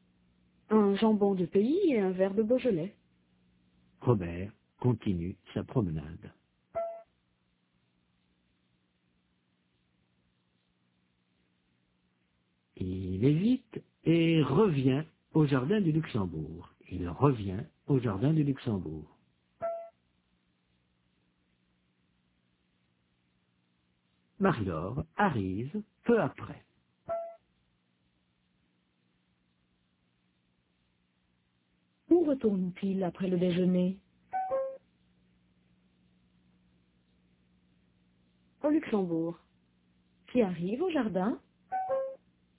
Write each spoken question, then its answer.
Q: Où retourne-t-il après le déjeuner?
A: Au Luxembourg.

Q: Qui arrive au jardin?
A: Marie-Laure.